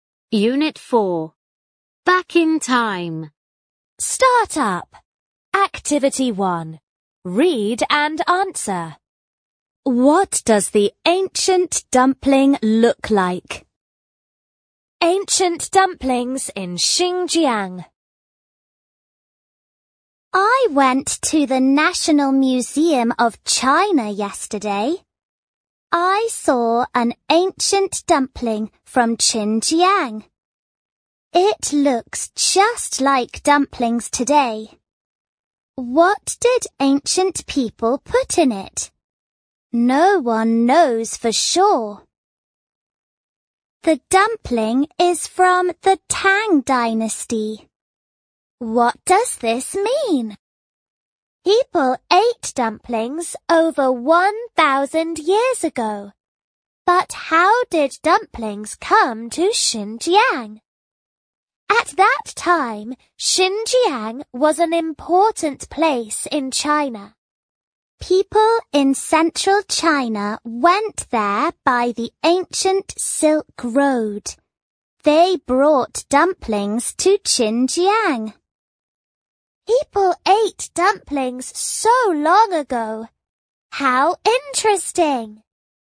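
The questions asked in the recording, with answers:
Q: What does the ancient dumpling look like?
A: It looks just like dumplings today.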